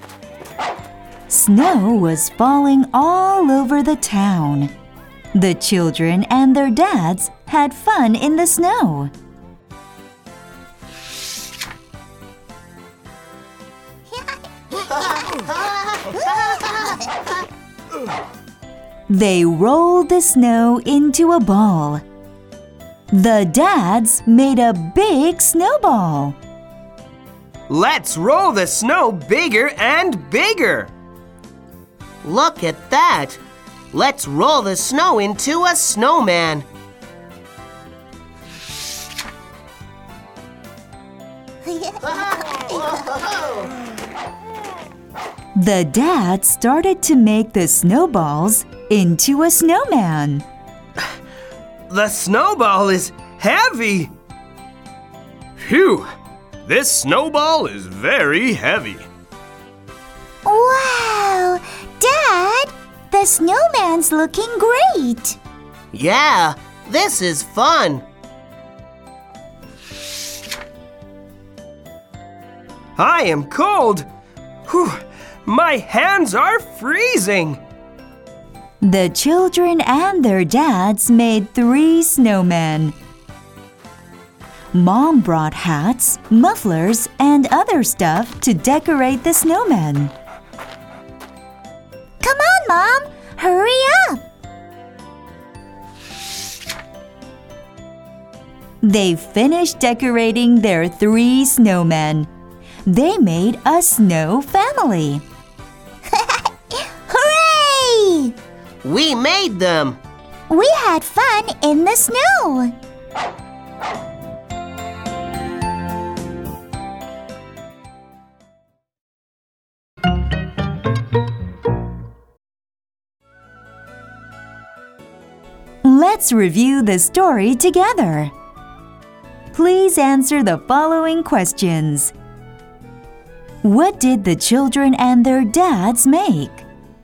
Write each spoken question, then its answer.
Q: What did the children and their dads make?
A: They made snowmen.